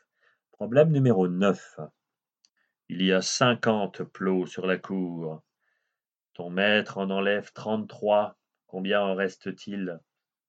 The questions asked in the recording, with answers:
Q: Ton maître en enlève 33. Combien en reste-t-il?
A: Il en reste 17.